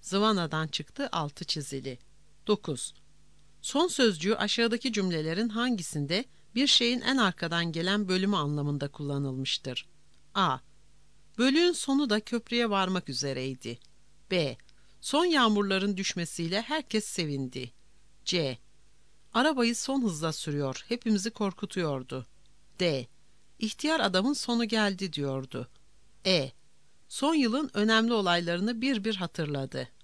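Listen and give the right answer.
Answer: A: Bölüğün sonu da köprüye varmak üzereydi.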